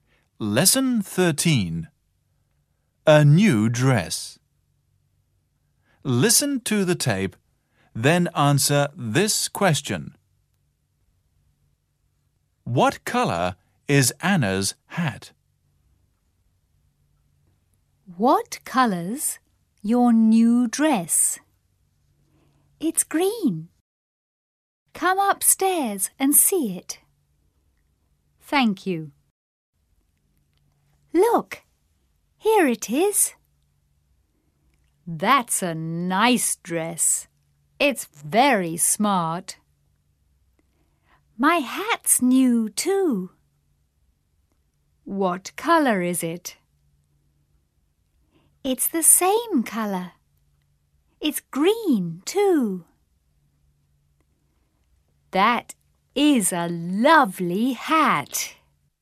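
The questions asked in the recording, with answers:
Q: What color is Anna's hat?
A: Green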